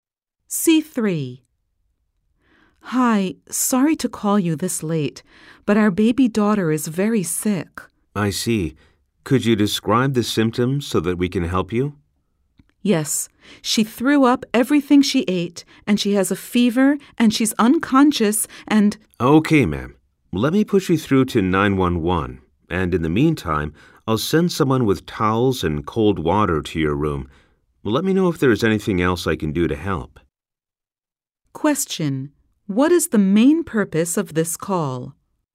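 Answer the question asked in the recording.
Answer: To get help for her very sick baby daughter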